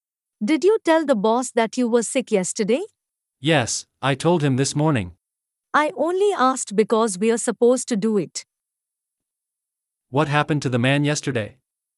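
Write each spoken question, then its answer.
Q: What happened to the man yesterday?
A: He was sick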